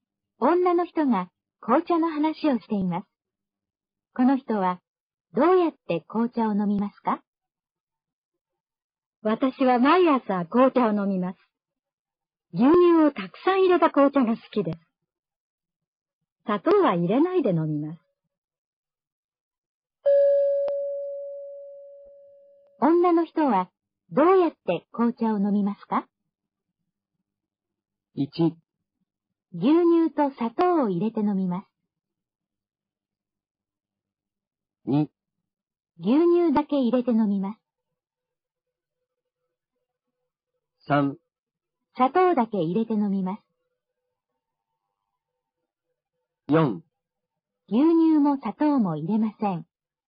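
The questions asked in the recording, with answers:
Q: 女の人はどうやって紅茶を飲みますか?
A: 2: 牛乳だけ入れて飲みます。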